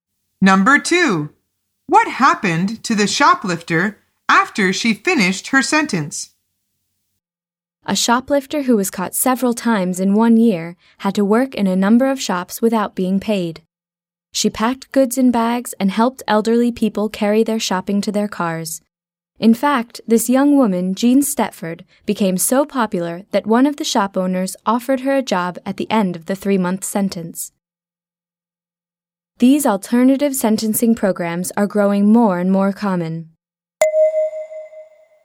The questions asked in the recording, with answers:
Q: What happened to the shoplifter after she finished her sentence?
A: The answer is she was offered a job by one shop owner.